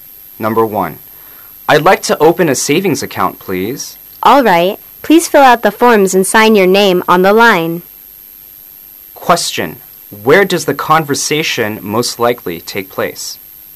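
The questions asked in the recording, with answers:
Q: where does the conversation most likely take place?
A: At a bank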